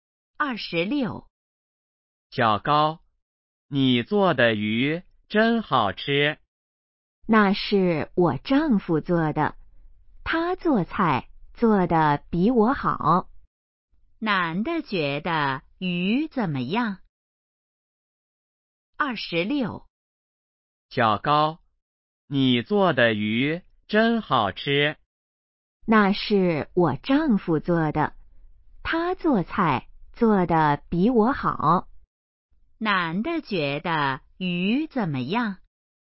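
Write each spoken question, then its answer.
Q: 男的觉得鱼怎么样?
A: 很好吃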